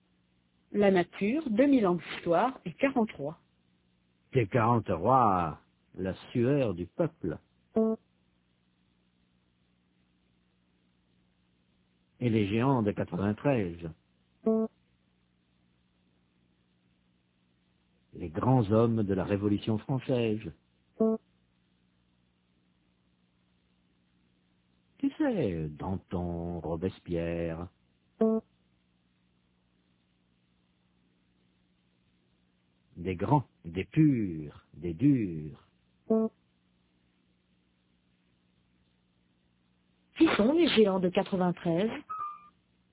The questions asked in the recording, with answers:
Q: Qui sont les géants de 93?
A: Les grands hommes de la Révolution française, Danton, Robespierre.